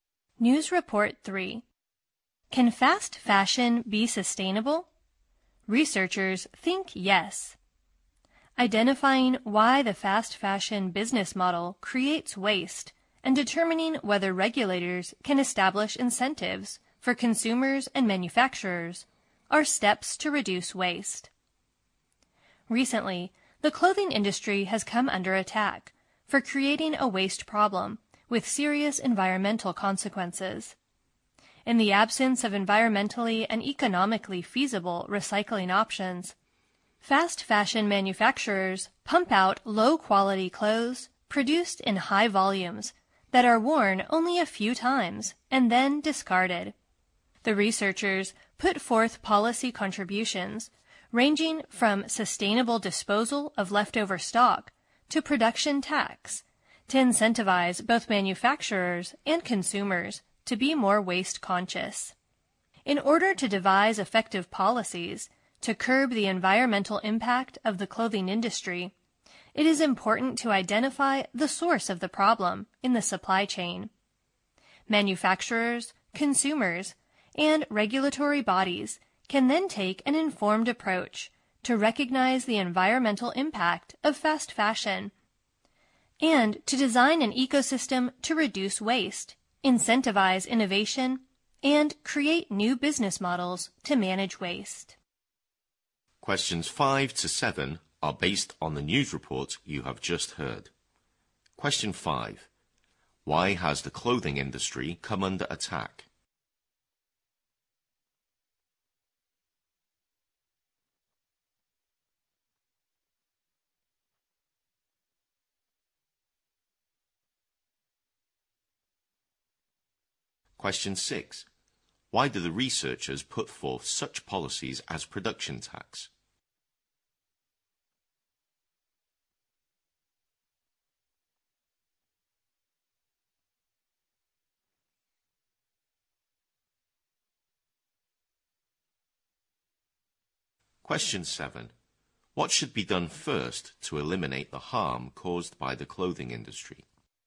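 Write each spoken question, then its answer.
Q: Why has the clothing industry come under attack?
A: Its waste problem has serious effects on the environment.

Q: Why do the researchers put forth such policies as production tax?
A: To get manufacturers and consumers to be more careful about waste

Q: What should be done first to eliminate the harm caused by the clothing industry?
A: Find where the problem starts in the supply chain.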